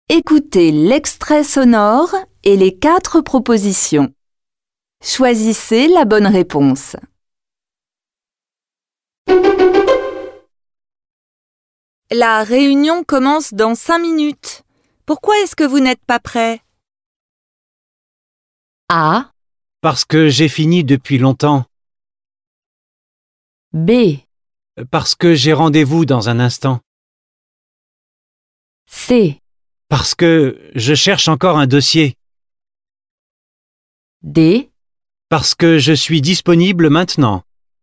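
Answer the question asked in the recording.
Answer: C: Parce que je cherche encore un dossier.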